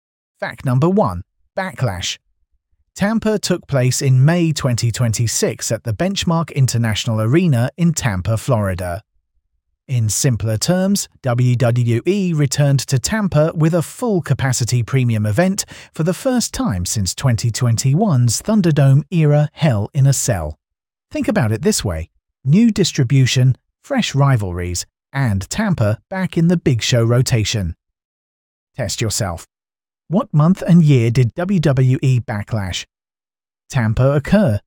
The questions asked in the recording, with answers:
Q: What month and year did WWE Backlash Tampa occur?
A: Correct answer, May 2026.